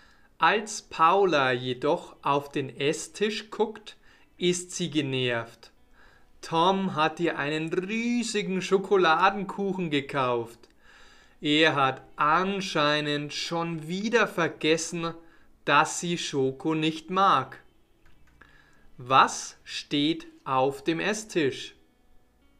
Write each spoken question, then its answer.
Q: Was steht auf dem Esstisch?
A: Ein riesiger Schokoladenkuchen.